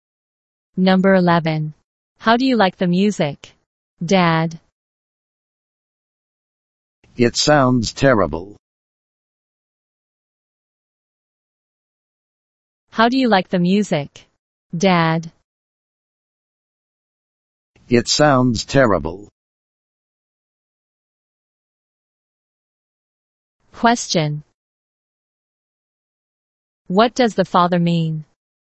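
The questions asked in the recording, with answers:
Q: What does the father mean?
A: He doesn't like the music; it sounds terrible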